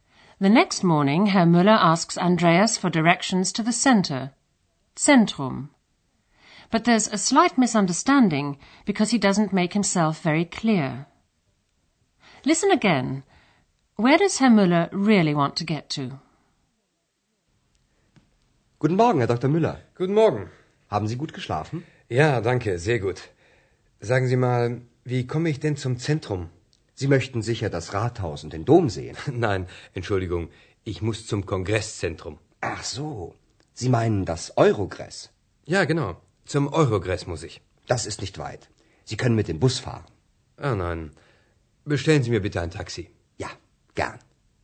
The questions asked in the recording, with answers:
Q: Where does Herr Müller really want to get to?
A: Herr Müller doesn't want to get to the city center, but to the Congress Center.